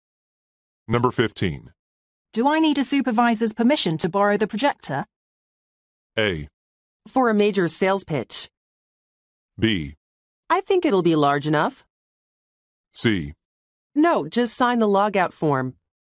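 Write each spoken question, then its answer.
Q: Do I need a supervisor's permission to borrow the projector?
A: C: No, just sign the logout form.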